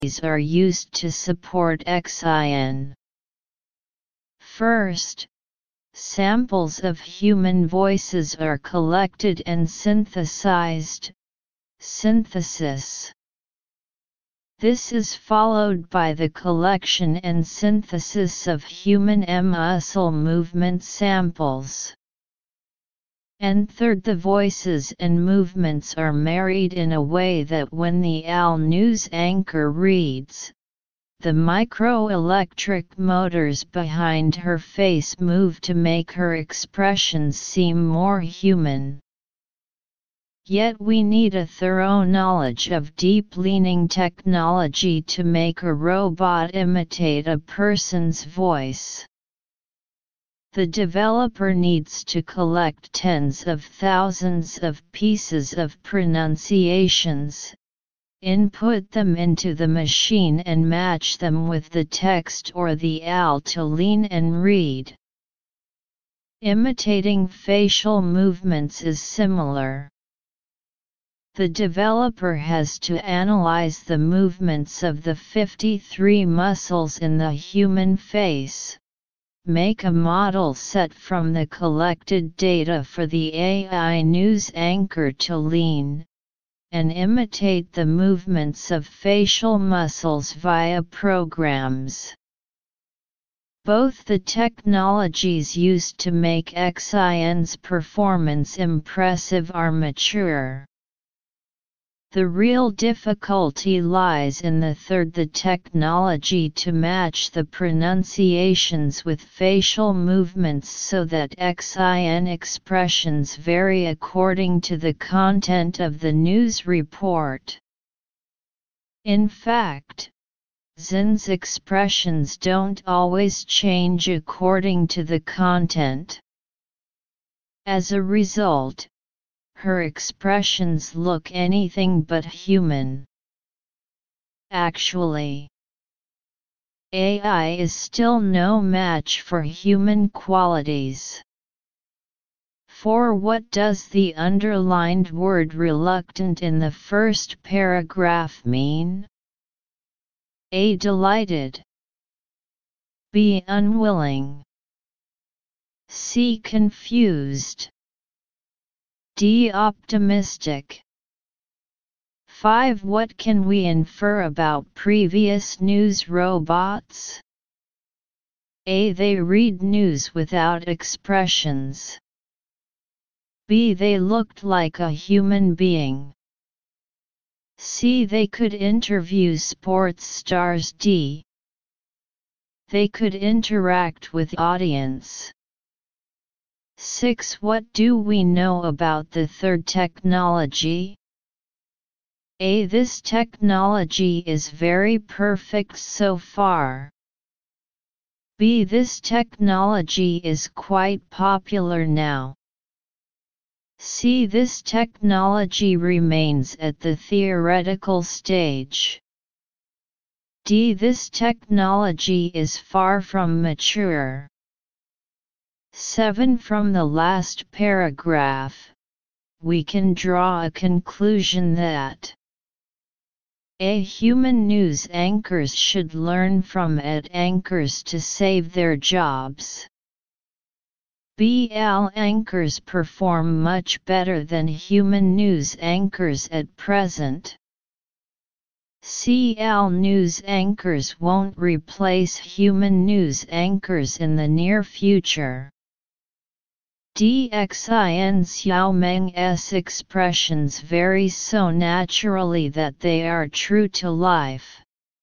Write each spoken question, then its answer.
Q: What do we know about the third technology?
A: 6. D.

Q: From the last paragraph, we can draw a conclusion that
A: 7. C.